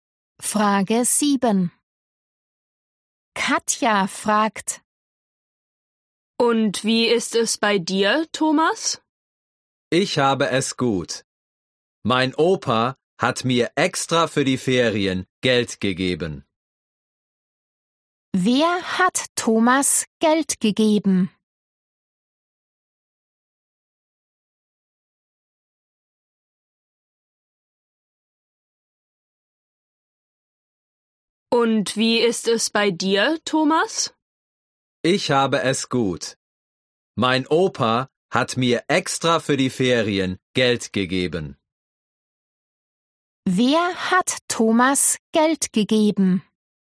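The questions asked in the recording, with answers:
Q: Wer hat Thomas Geld gegeben?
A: Sein Opa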